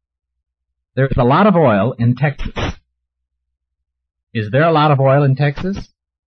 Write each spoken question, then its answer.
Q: Is there a lot of oil in Texas?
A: There is a lot of oil in Texas.